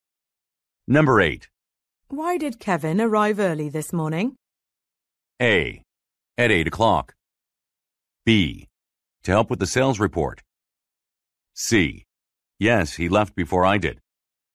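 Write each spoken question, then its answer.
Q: Why did Kevin arrive early this morning?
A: B: To help with the sales report.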